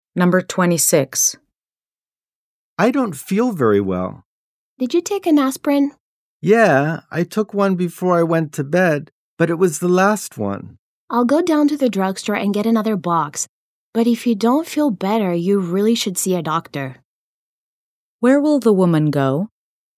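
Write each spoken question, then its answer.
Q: Where will the woman go?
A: To the drugstore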